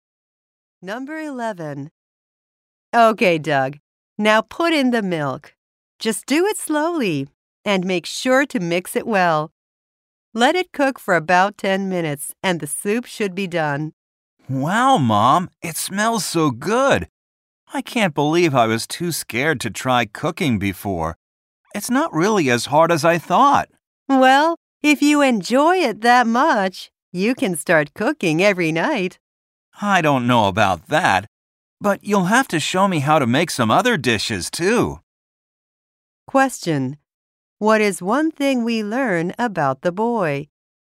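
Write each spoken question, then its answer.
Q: What is one thing we learn about the boy?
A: He was scared to try cooking before but found it not as hard as he thought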